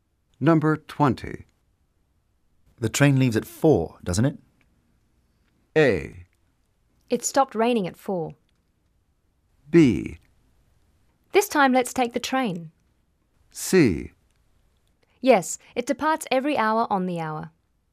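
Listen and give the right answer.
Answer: C: Yes, it departs every hour on the hour.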